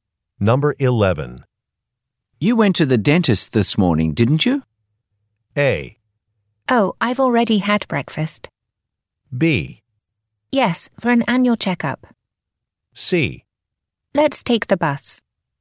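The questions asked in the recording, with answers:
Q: You went to the dentist this morning, didn't you?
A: B: Yes, for an annual checkup.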